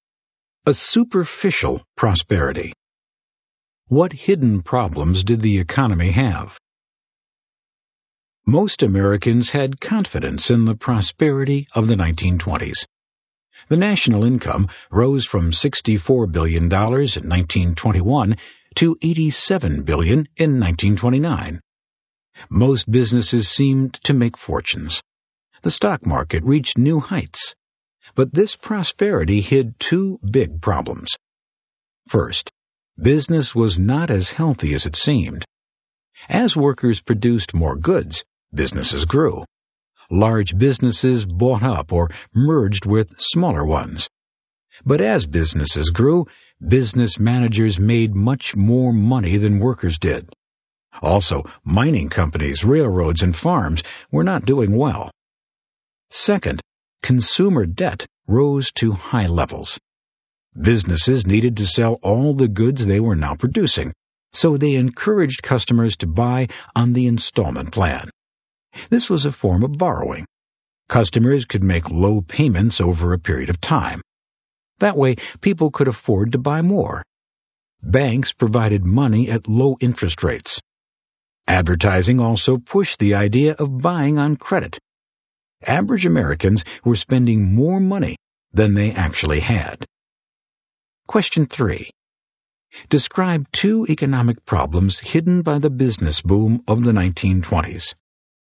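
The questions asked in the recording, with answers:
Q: Describe two economic problems hidden by the business boom of the 1920s.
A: Business was not as healthy as it seemed (managers earned far more than workers; mining, railroads and farms struggled), and consumer debt rose to high levels through buying on credit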